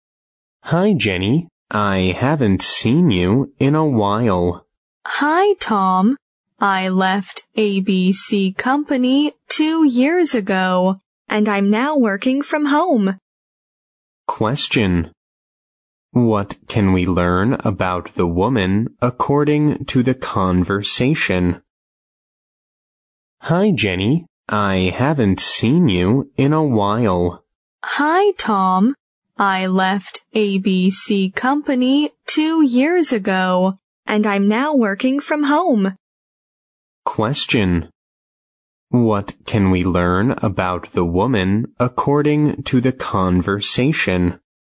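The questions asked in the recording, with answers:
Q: What can we learn about the woman according to the conversation?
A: She now works from home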